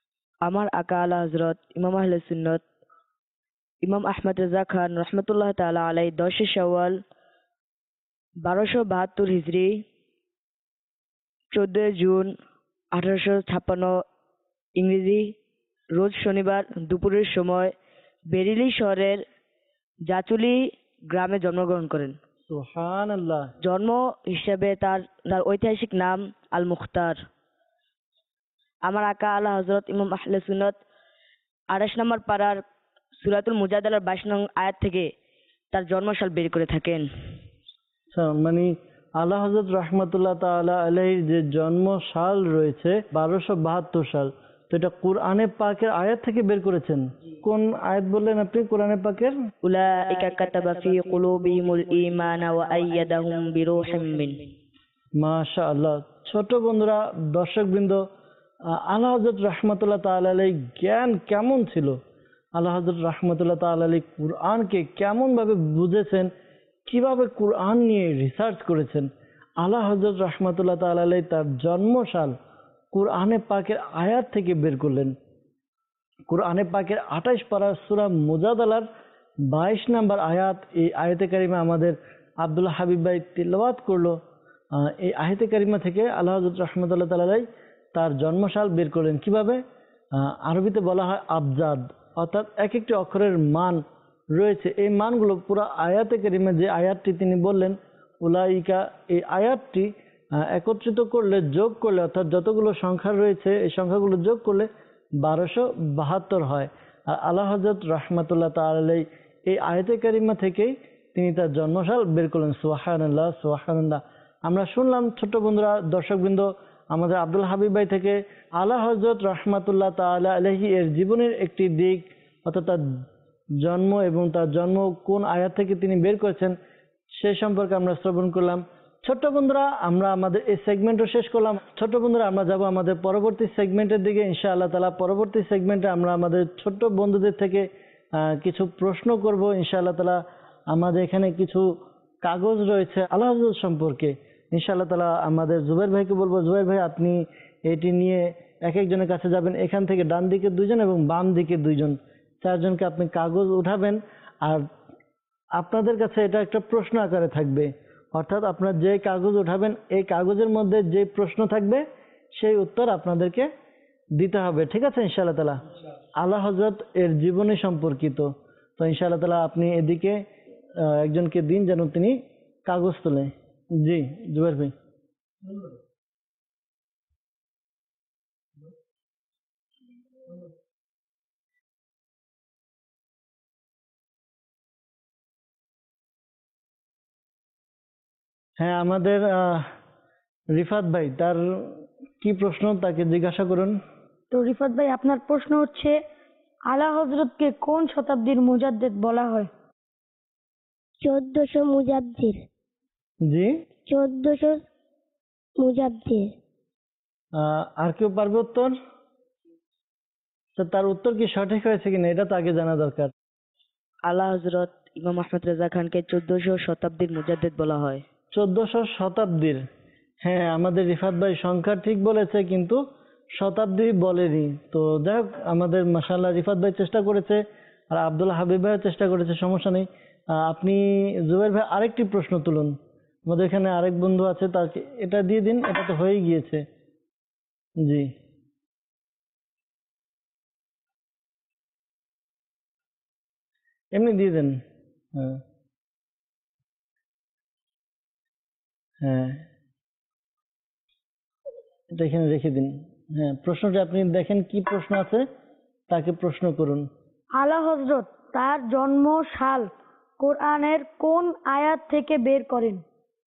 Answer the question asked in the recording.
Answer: আলা হযরত ইমাম আহমদ রেজা খান রহমাতুল্লাহি তাআলা আলাই এর জন্ম সাল 28 পারা সূরা মুজাদালা 22 আয়াত থেকে বের করেন।